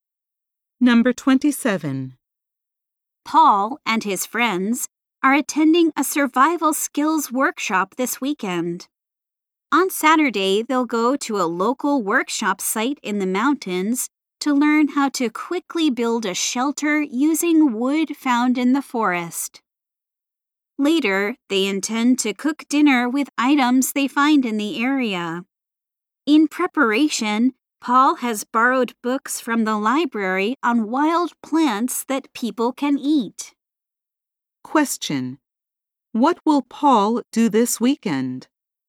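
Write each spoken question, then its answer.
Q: What will Paul do this weekend?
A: Attend a survival skills workshop in the mountains.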